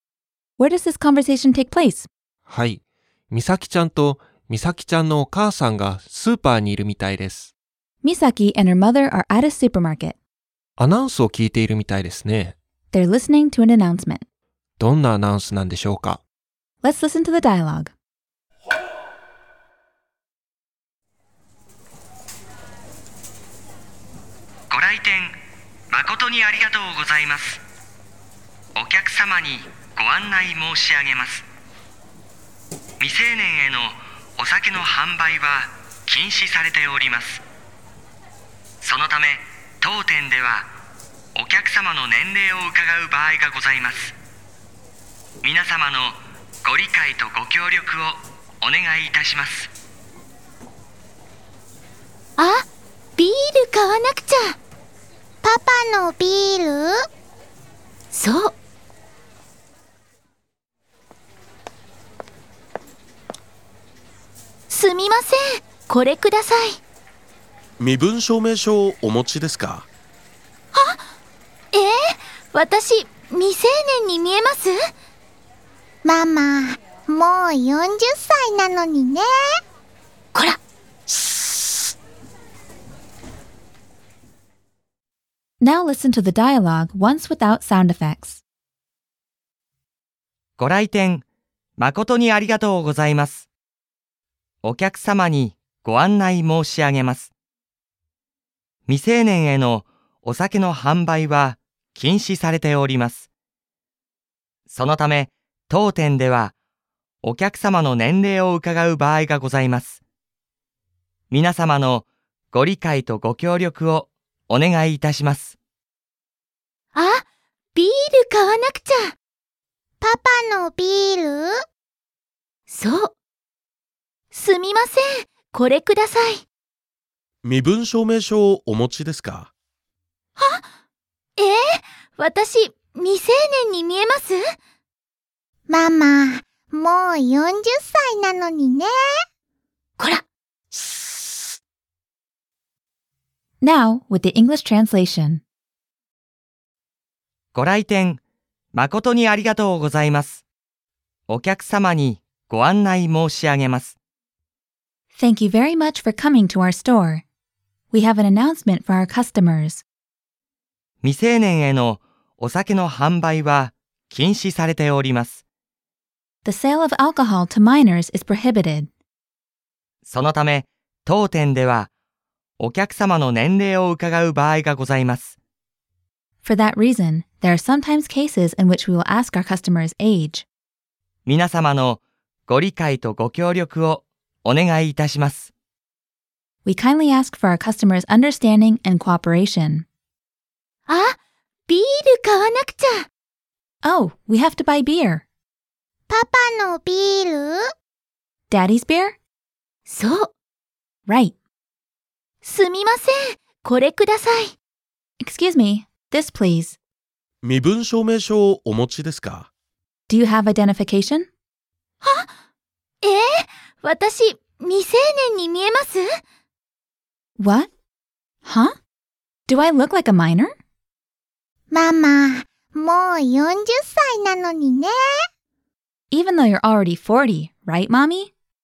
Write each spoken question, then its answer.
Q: どんなアナウンスなんでしょうか?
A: お酒のアナウンスでしたね。